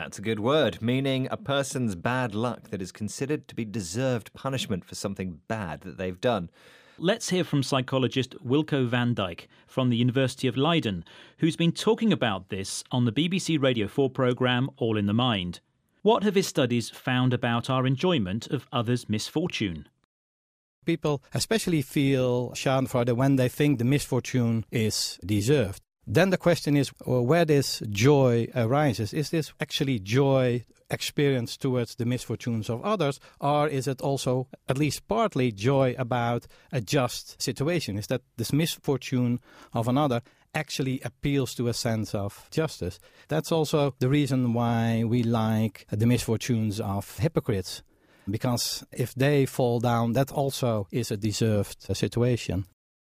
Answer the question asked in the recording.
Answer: Okay, so Wilco van Dijk's studies found we get joy when someone's misfortune is deserved.